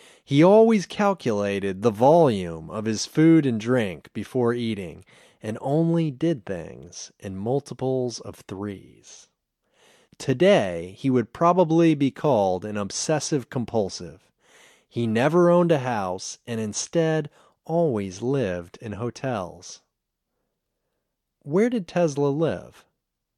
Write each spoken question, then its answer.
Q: Where did Tesla live?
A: He always lived in hotels.